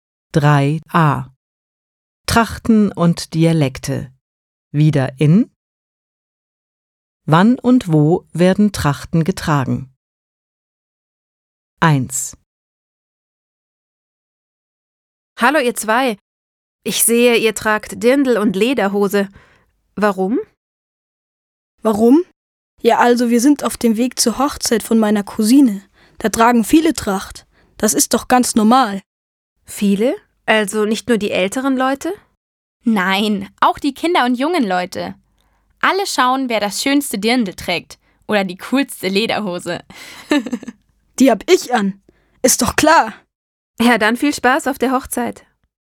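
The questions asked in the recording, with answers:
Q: Wann und wo werden Trachten getragen?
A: Auf einer Hochzeit (der Cousine), von Kindern, jungen und älteren Leuten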